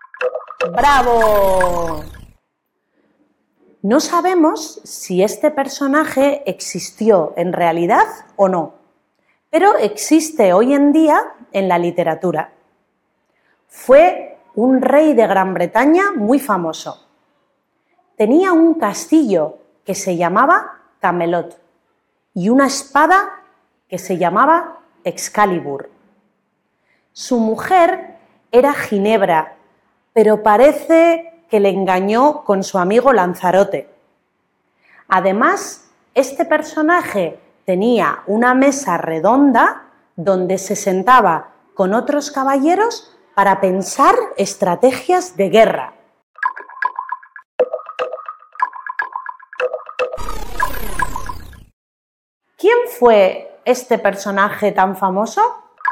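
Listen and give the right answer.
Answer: El rey Arturo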